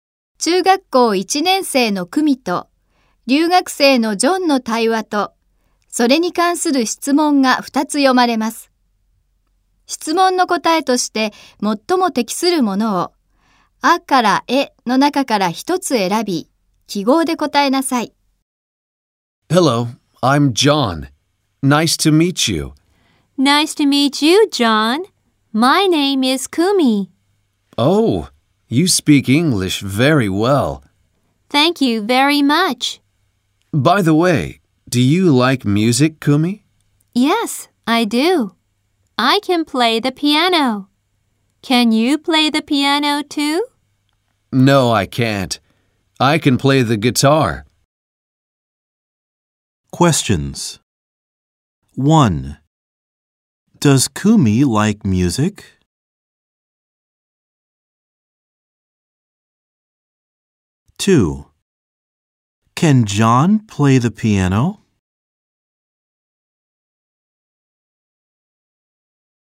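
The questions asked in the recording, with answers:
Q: Does Kumi like music?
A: Yes, she does.

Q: Can John play the piano?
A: No, he can't.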